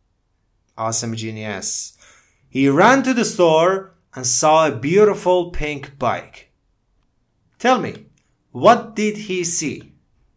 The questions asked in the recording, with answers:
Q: Tell me, what did he see?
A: A pink bike. He saw a pink bike.